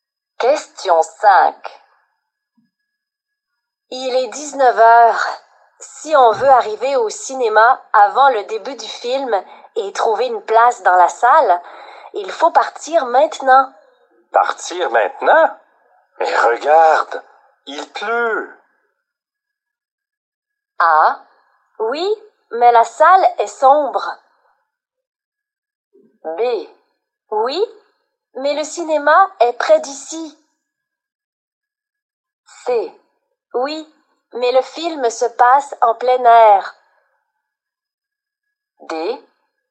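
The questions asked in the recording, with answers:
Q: Partir maintenant? Mais regarde, il pleut.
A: B: Oui, mais le cinéma est près d'ici.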